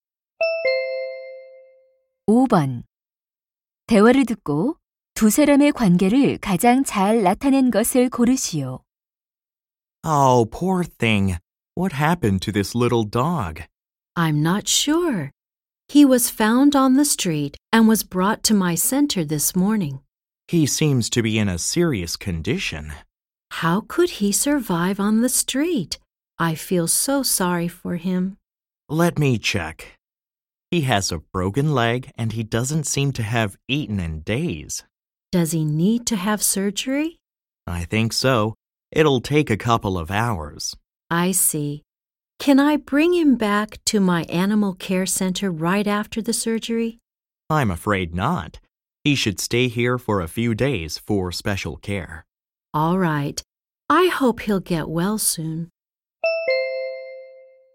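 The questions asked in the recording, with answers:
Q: 대화를 듣고 두 사람의 관계를 가장 잘 나타낸 것을 고르시오.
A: 동물 보호소 직원 - 수의사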